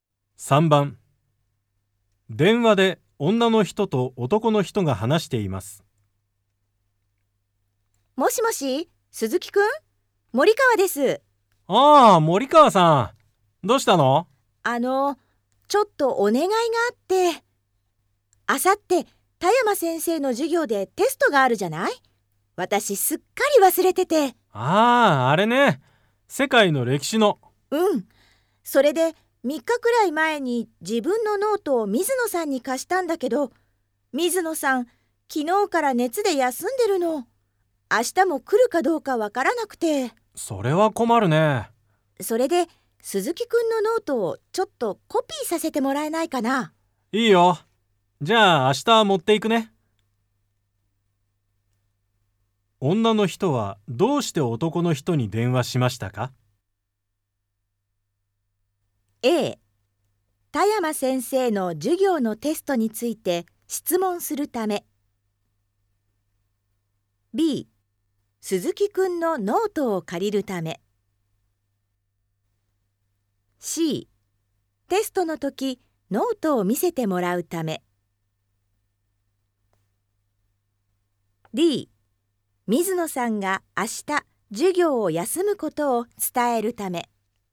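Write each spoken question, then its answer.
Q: 女の人はどうして男の人に電話しましたか?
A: B: 鈴木くんのノートを借りるため。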